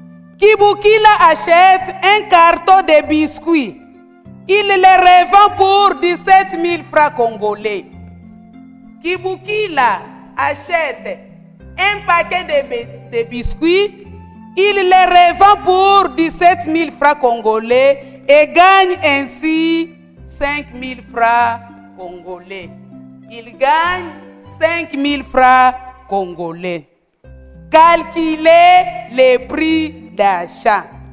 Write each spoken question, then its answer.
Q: Calculez le prix d'achat.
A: La réponse égale 12 000 francs congolais.